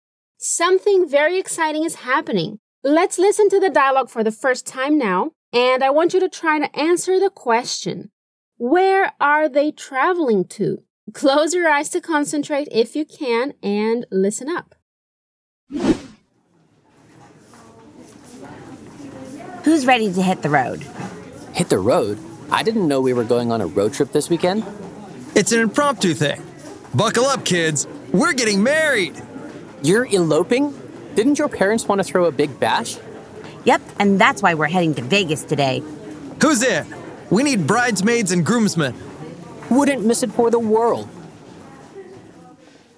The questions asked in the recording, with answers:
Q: Where are they traveling to?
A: Las Vegas.